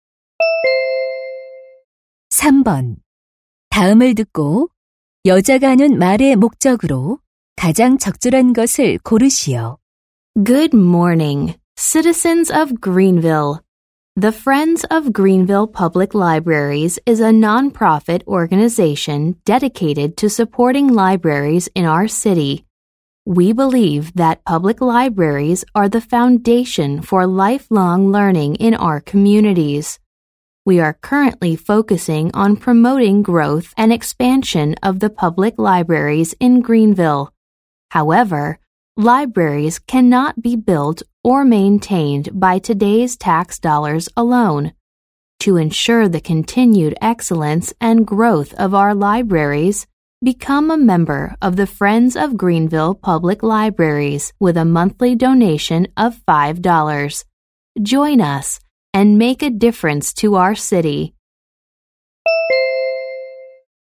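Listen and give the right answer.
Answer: 도서관 후원 단체 회원 가입(월 5달러 기부) 권유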